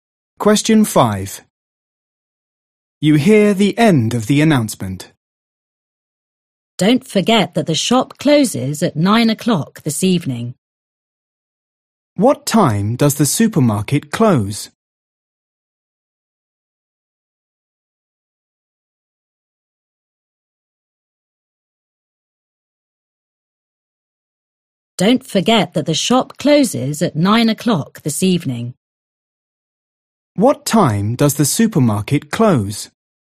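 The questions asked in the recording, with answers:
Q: What time does the supermarket close?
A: 9 o'clock this evening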